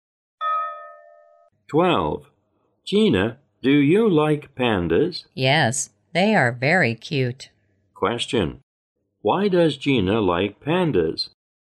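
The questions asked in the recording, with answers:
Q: Why does Gina like pandas?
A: Because they are very cute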